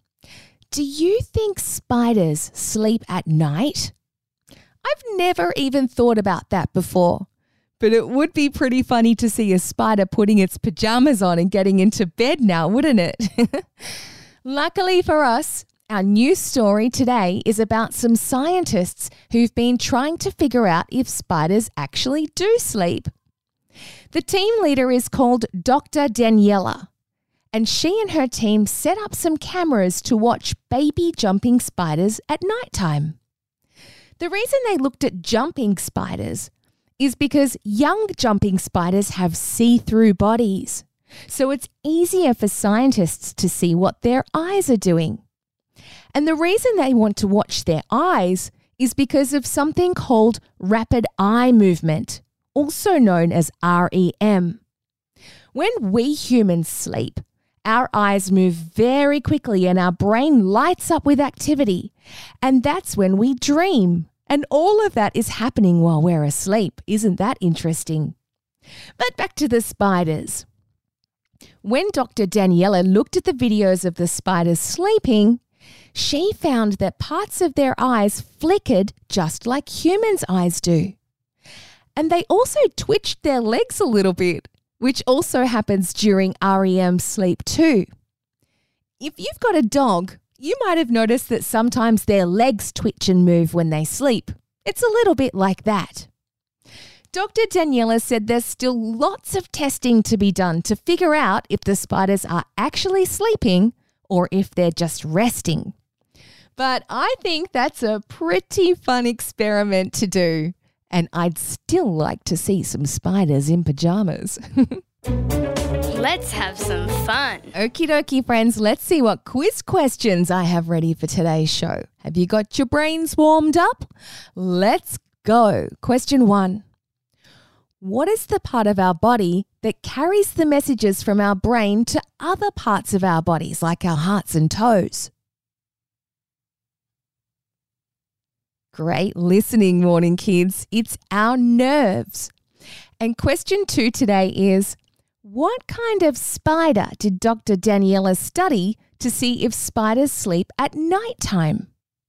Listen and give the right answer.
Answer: They're the jumping spiders.